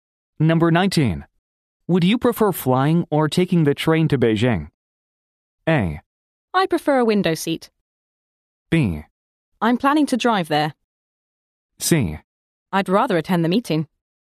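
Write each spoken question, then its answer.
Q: Would you prefer flying or taking the train to Beijing?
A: B: I'm planning to drive there.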